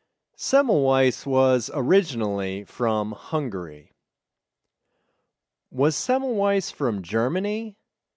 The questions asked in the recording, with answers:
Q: Was Semmelweis from Germany?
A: No, he wasn't from Germany.